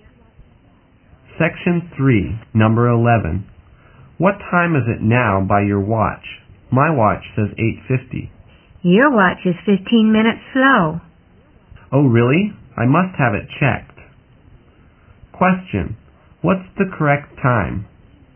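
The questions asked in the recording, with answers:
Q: What's the correct time?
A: 9:05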